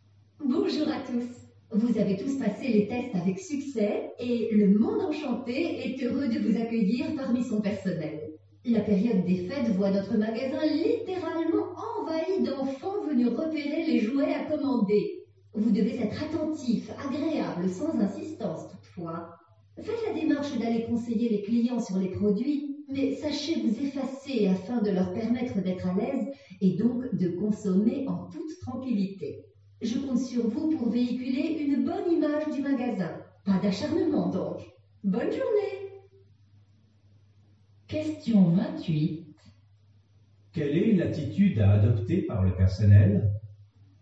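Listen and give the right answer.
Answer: Être attentif et agréable, conseiller les clients sans insister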